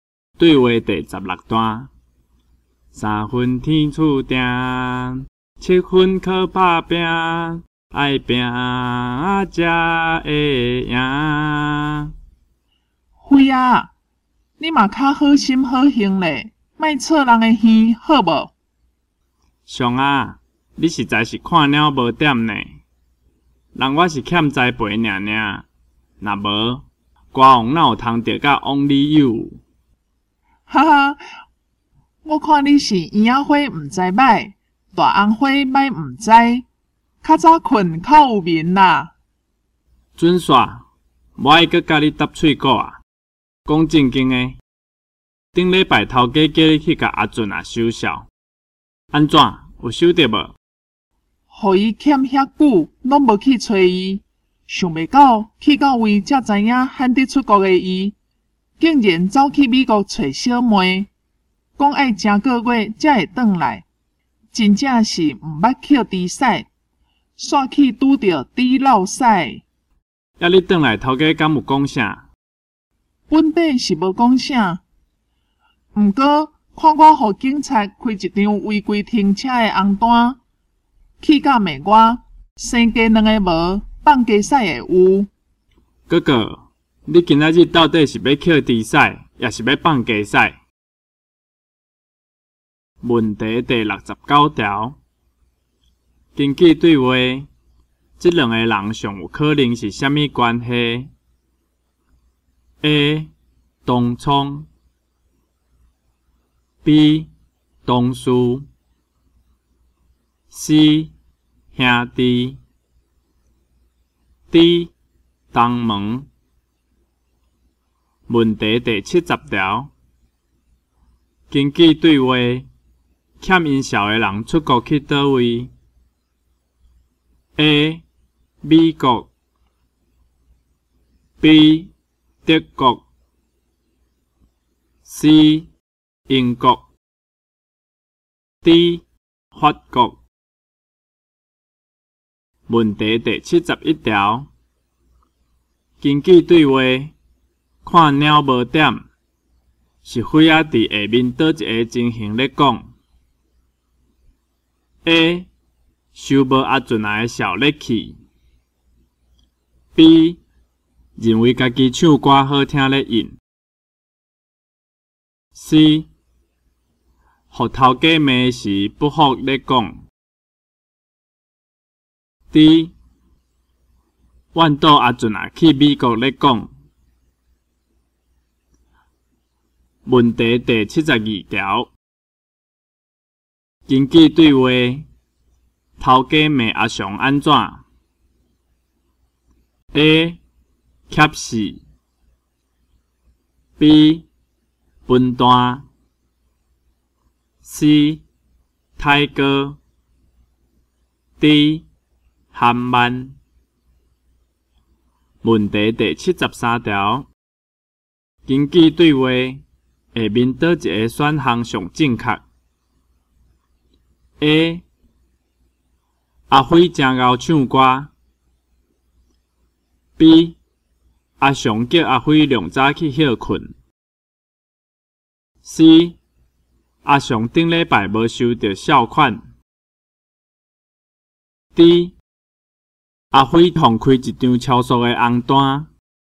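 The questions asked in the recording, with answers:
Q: 根据对话,这两个人上有可能是啥物关系 ?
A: B: 同事

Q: 根据对话,欠因小的人出国去倒位 ?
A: A: 美国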